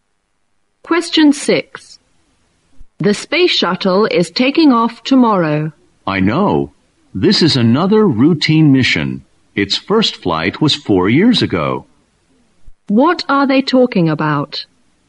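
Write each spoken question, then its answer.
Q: What are they talking about?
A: The space shuttle's launch tomorrow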